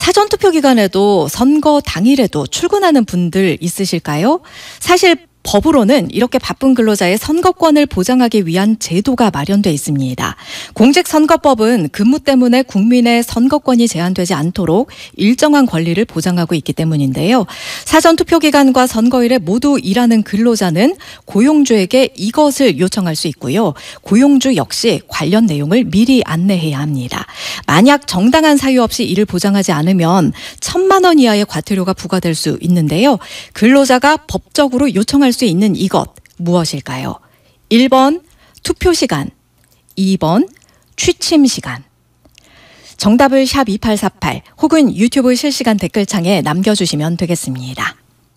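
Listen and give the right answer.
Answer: 1번: 투표 시간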